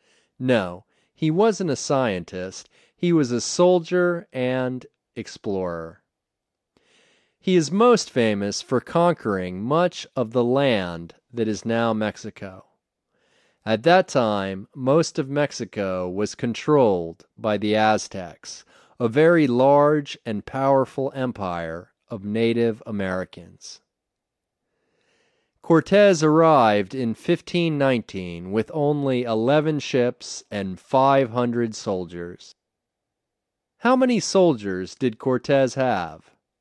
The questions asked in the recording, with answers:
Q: How many soldiers did Cortez have?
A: He had 500 soldiers.